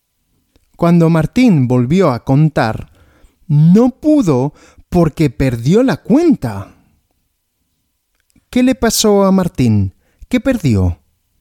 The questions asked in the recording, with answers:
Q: ¿Qué le pasó a Martín? ¿Qué perdió?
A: La cuenta, perdió la cuenta.